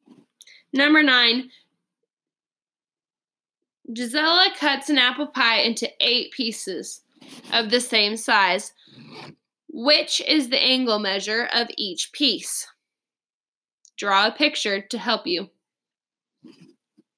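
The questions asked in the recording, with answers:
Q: Which is the angle measure of each piece?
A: 45 degrees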